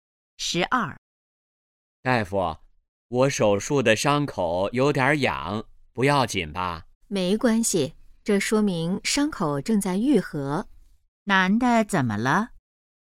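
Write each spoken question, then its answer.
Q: 男的怎么了?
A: 手术伤口有点痒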